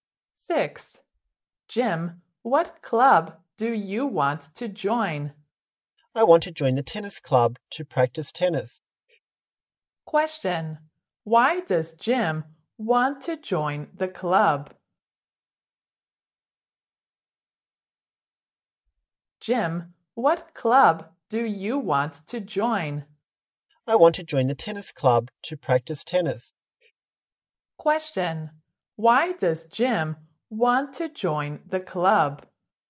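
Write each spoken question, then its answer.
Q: Why does Jim want to join the club?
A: To practice tennis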